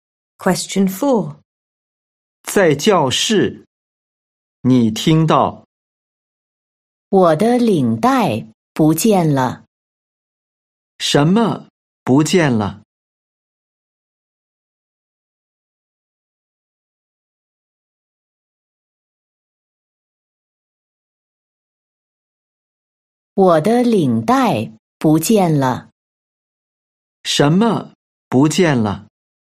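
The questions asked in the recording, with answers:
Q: 什么不见了?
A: 领带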